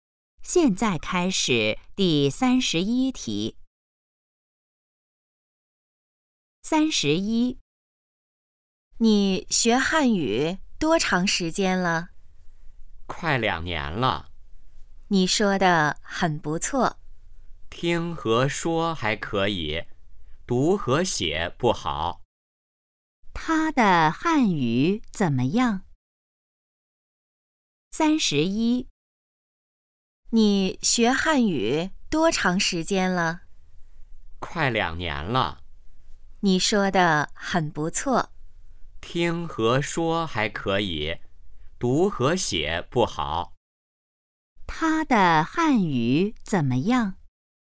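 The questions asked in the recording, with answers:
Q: 他的汉语怎么样?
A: 听和说还可以,读和写不好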